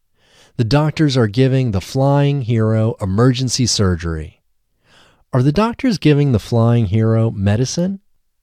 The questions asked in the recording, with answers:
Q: Are the doctors giving the flying hero medicine?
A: No, the doctors aren't giving the flying hero medicine.